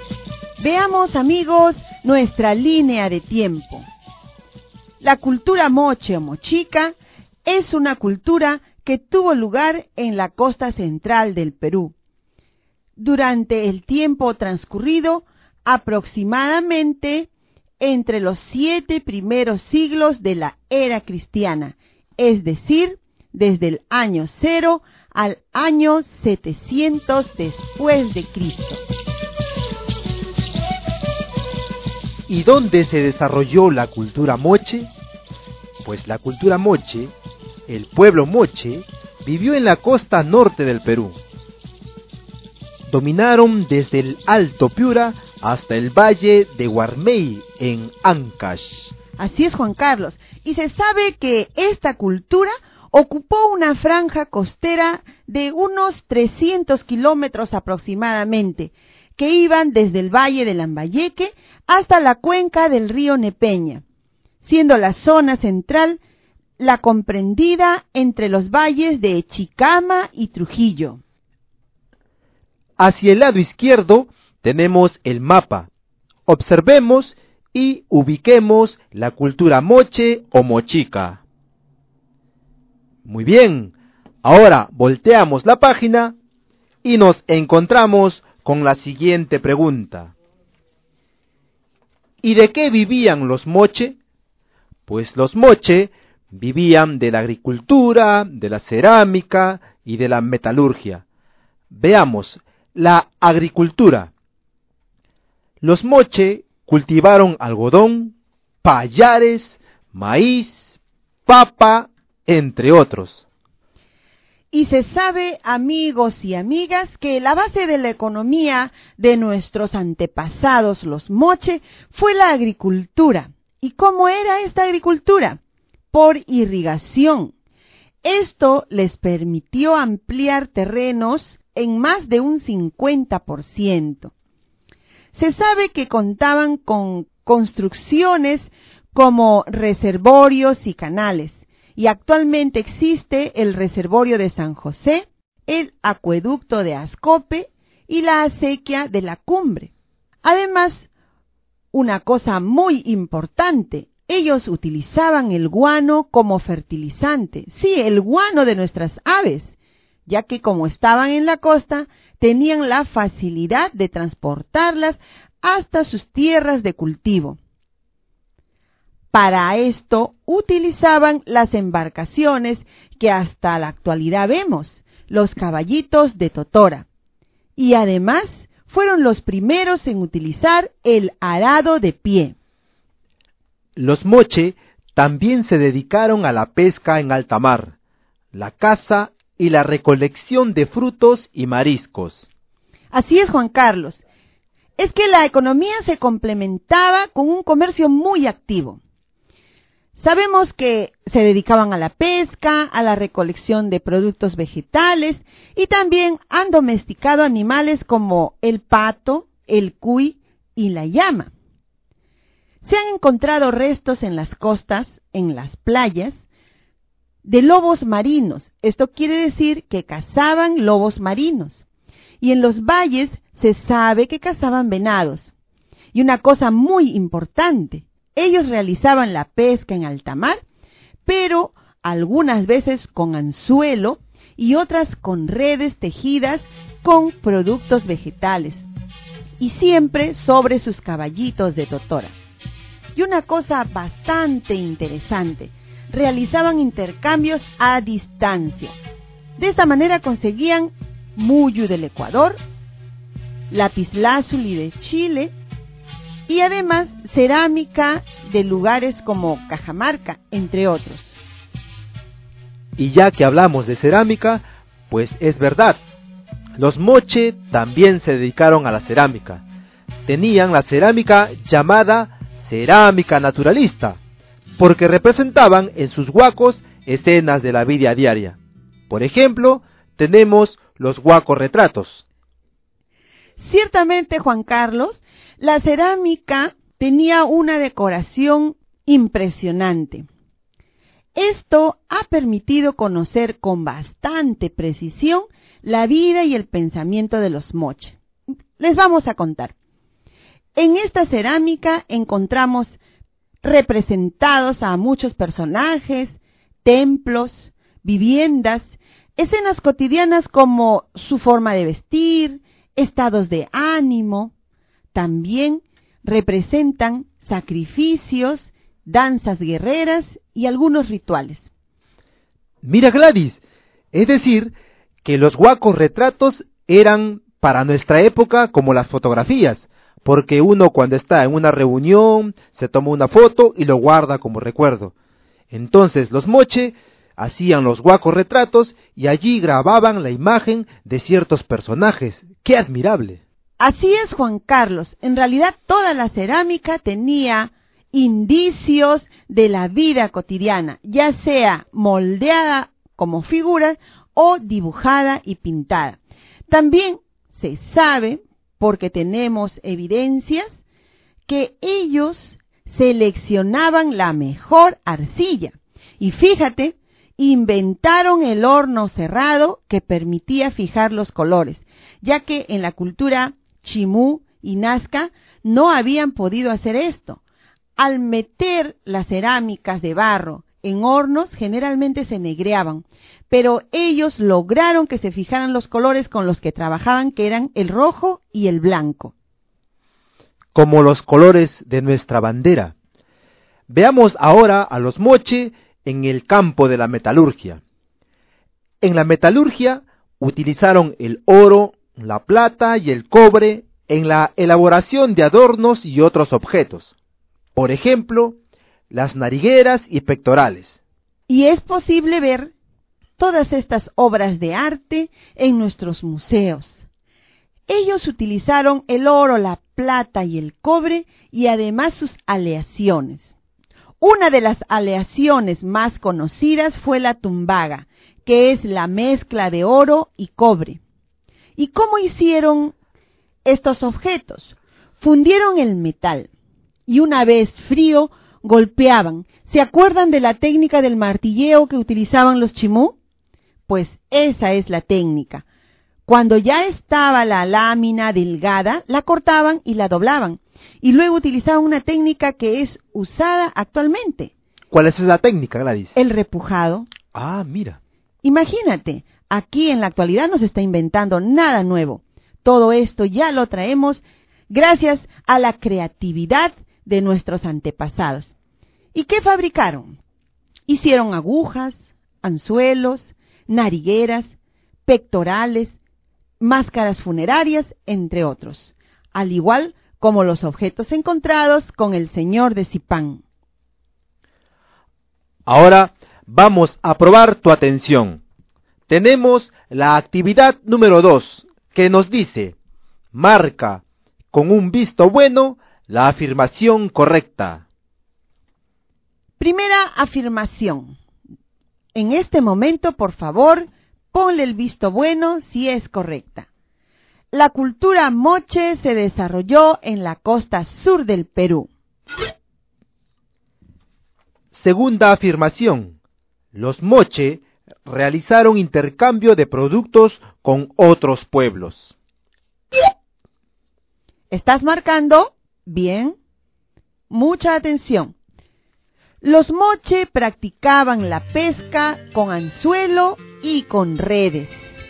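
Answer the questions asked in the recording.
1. Incorrecta: se desarrolló en la costa norte
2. Correcta
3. Correcta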